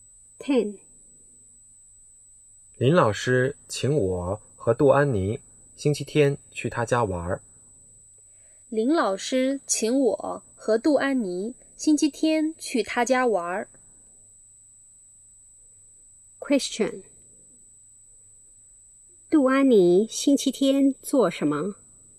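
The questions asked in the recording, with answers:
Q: 杜安妮星期天做什么?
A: 去林老师家玩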